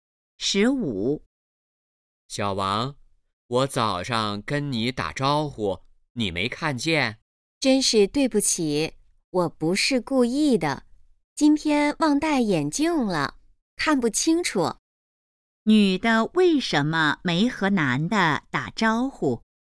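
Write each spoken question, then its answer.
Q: 女的为什么没和男的打招呼?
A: 忘戴眼镜,看不清楚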